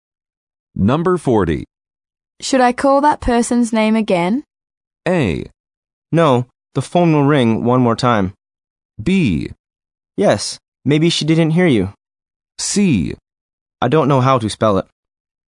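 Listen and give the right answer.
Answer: B: Yes, maybe she didn't hear you.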